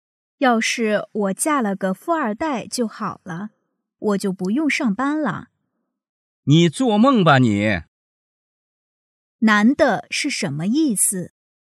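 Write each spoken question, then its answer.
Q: 男的是什么意思?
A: 女的是在做梦,不可能实现

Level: 汉语水平考试(MHK)三级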